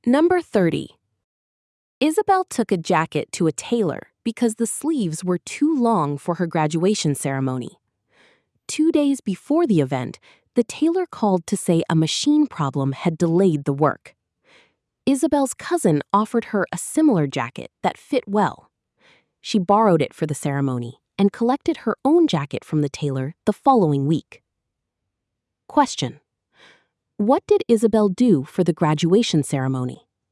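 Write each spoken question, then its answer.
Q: What did Isabel do for the graduation ceremony?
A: She borrowed her cousin's jacket.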